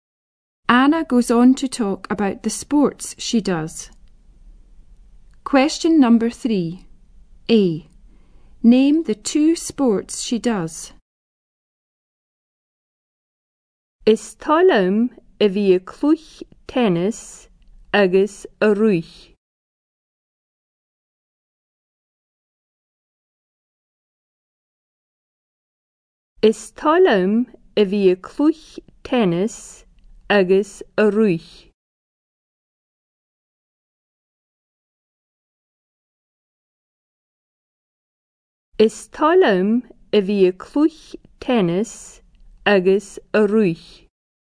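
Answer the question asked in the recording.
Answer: Tennis and running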